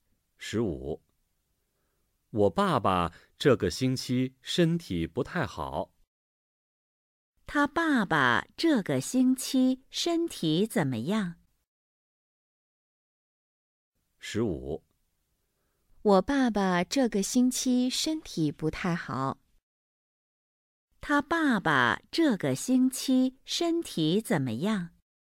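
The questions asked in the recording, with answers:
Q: 他爸爸这个星期身体怎么样?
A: 不太好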